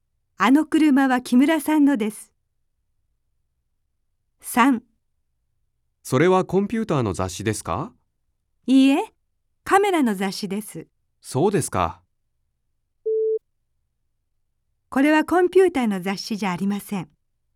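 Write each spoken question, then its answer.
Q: これはコンピューターの雑誌じゃありません。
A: はい(○):カメラの雑誌です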